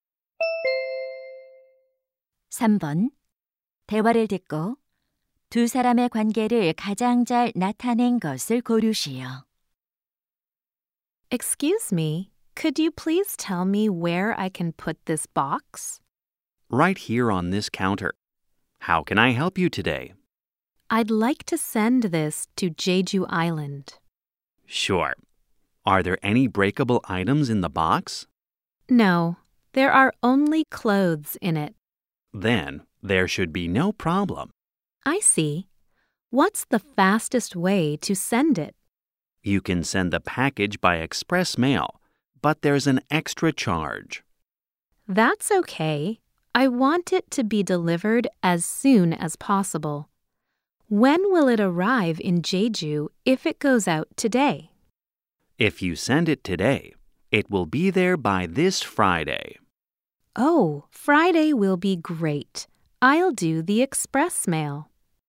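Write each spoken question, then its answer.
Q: 대화를 듣고 두 사람의 관계를 가장 잘 나타낸 것을 고르시오.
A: 우체국 직원과 고객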